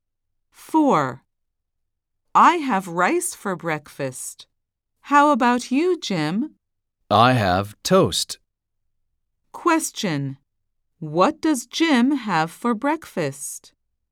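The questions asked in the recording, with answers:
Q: What does Jim have for breakfast?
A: toast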